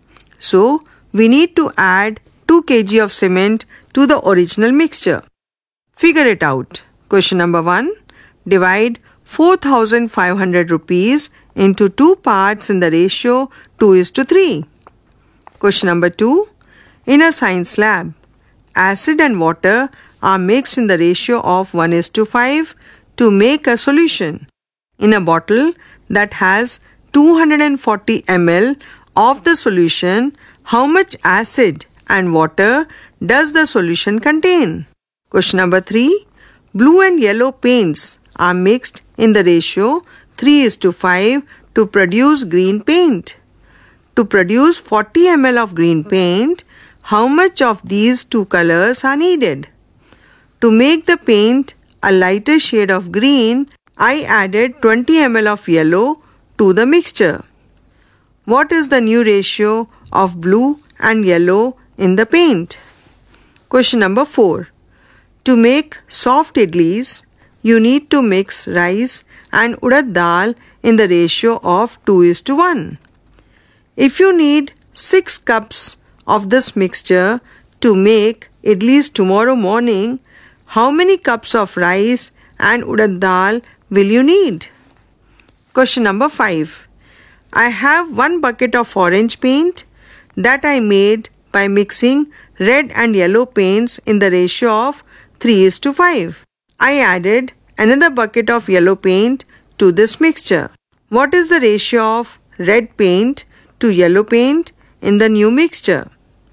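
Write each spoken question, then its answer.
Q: Divide 4,500 rupees into 2 parts in the ratio 2:3.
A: 1,800 rupees and 2,700 rupees

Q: In a bottle that has 240 ml of the solution, how much acid and water does the solution contain?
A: 40 ml acid and 200 ml water

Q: To produce 40 ml of green paint, how much of these two colors are needed?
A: 15 ml blue and 25 ml yellow

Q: What is the new ratio of blue and yellow in the paint?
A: 15:45, or 1:3

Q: If you need 6 cups of this mixture to make idlis tomorrow morning, how many cups of rice and urad dal will you need?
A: 4 cups of rice and 2 cups of urad dal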